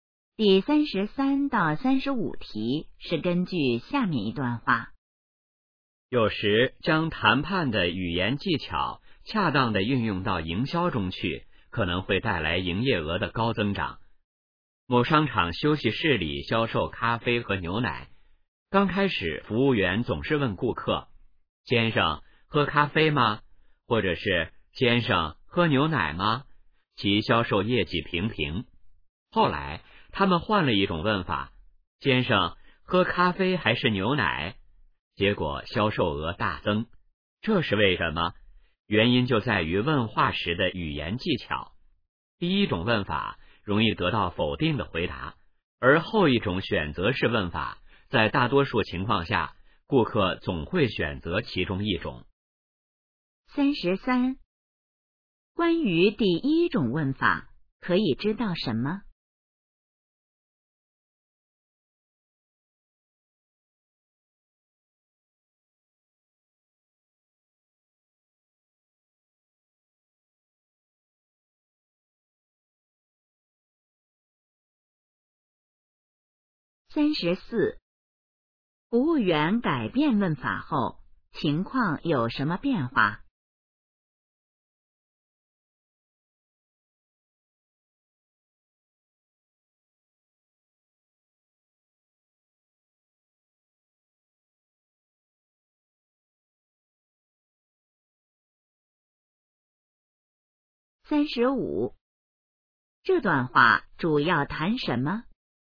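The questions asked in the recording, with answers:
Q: 关于第一种问法,可以知道什么?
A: 容易得到否定的回答

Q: 服务员改变问法后,情况有什么变化?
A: 销售额大增

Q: 这段话主要谈什么?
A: 问话的语言技巧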